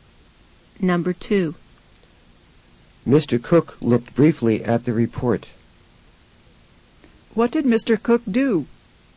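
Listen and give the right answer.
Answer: He looked briefly at the report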